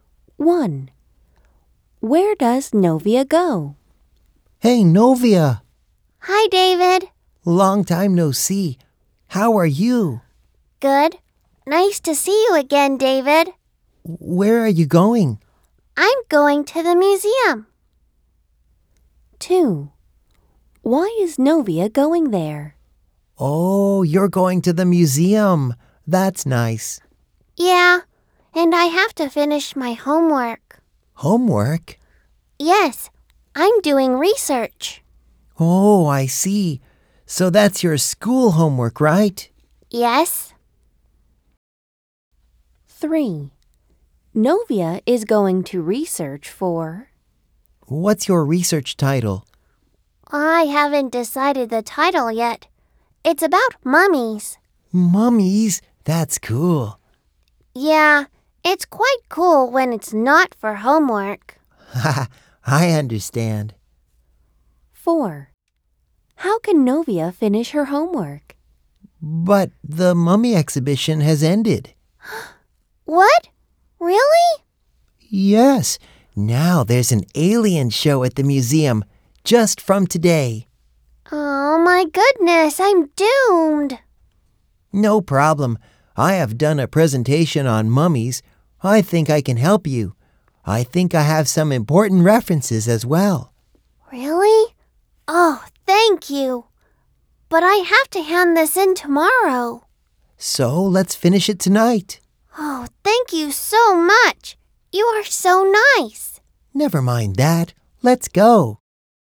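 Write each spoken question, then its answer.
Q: Where does Novia go?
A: To the museum

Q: Why is Novia going there?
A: To finish her homework (research)

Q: How can Novia finish her homework?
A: David will help her with his mummy references tonight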